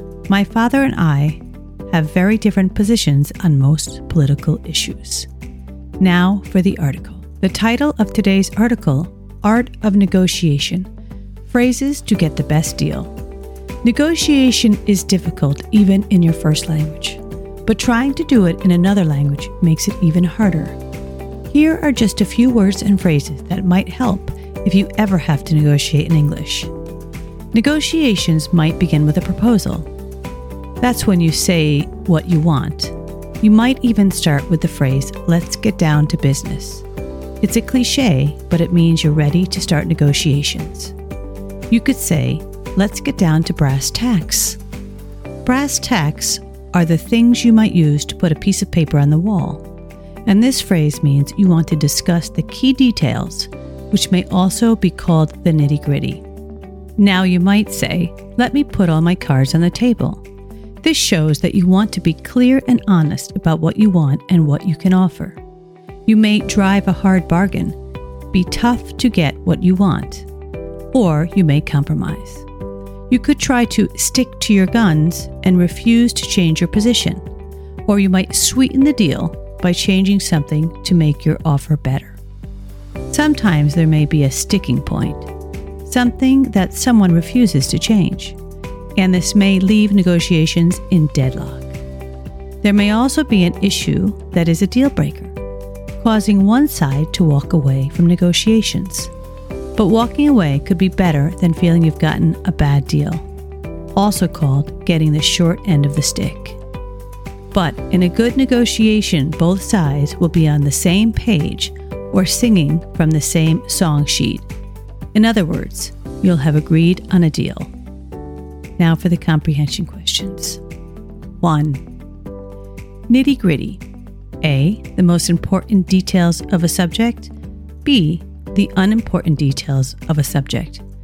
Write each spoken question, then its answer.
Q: Nitty-gritty. A. The most important details of a subject. B. The unimportant details of a subject.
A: Answer. A. The most important details of a subject.